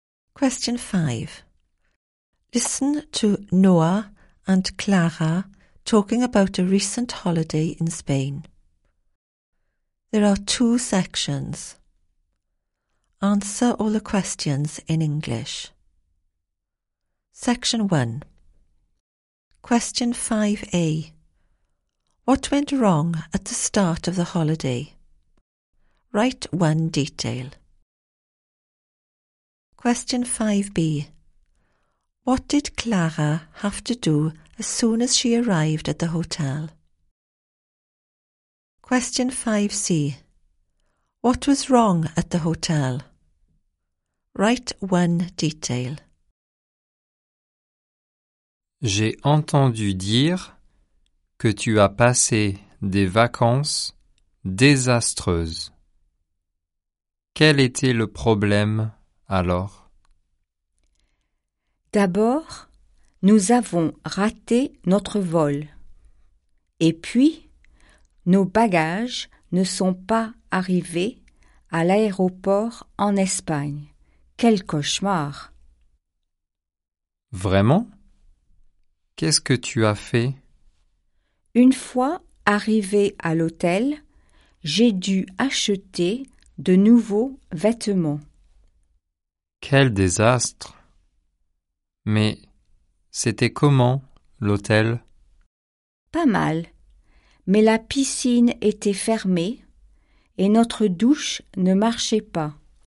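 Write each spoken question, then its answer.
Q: What went wrong at the start of the holiday?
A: They missed their flight / luggage didn't arrive

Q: What did Clara have to do as soon as she arrived at the hotel?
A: Buy new clothes

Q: What was wrong at the hotel?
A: Pool was closed / shower didn't work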